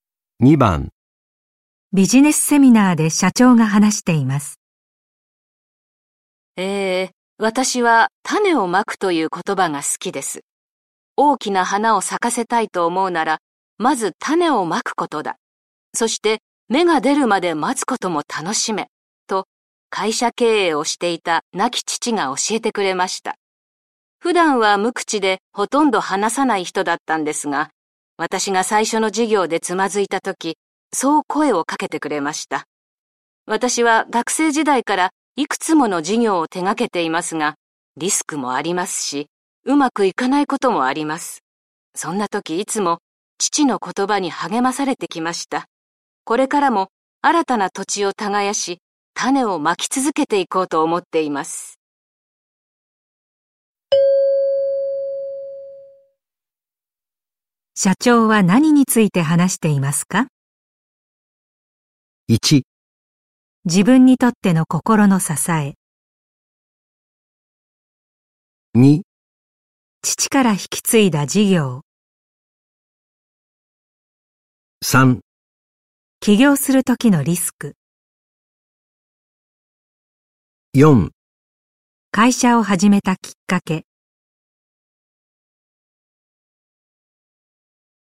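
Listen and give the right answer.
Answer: 1: 自分にとっての心の支え。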